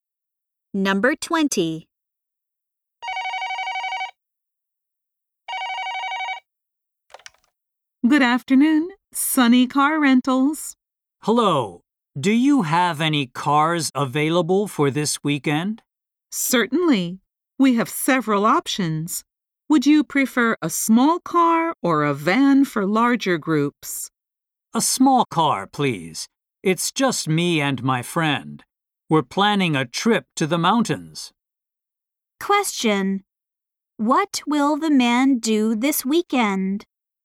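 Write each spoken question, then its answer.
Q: What will the man do this weekend?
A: Take a trip to the mountains with his friend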